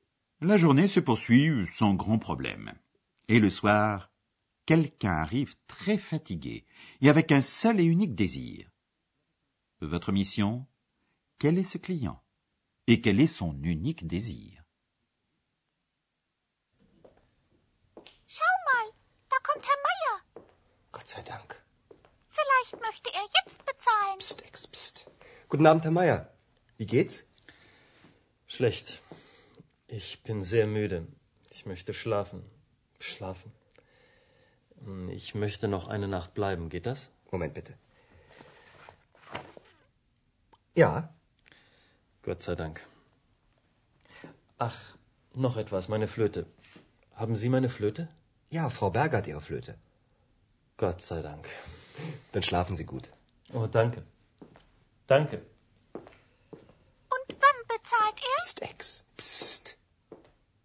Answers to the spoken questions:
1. Il s'agit bien de Monsieur Mayer
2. qui n'a qu'un désir, pouvoir dormir